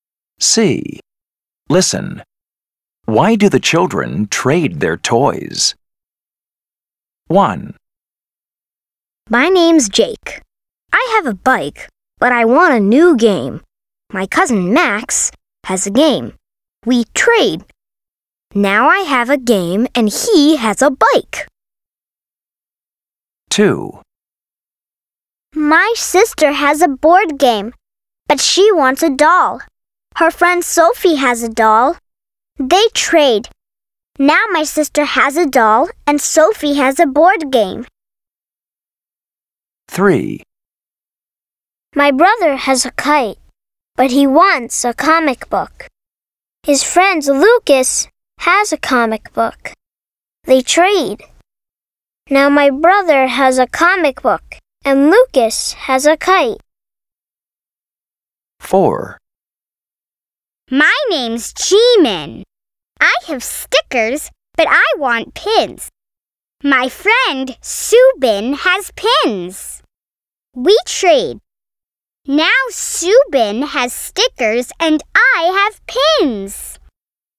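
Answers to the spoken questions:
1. Jake has a bike but wants a new game.
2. His sister has a board game but wants a doll.
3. His brother has a kite but wants a comic book.
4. G-Man has stickers but wants pins.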